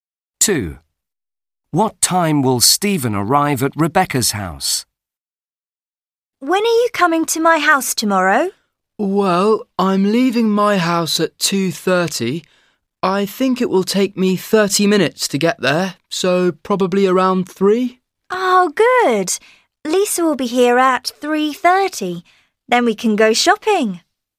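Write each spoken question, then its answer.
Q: What time will Stephen arrive at Rebecca's house?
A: Around 3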